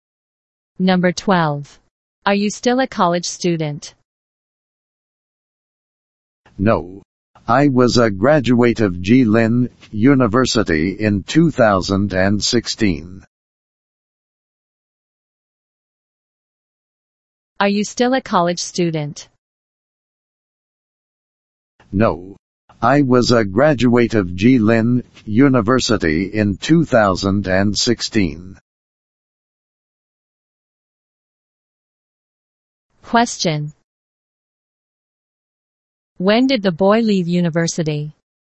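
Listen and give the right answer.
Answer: In 2016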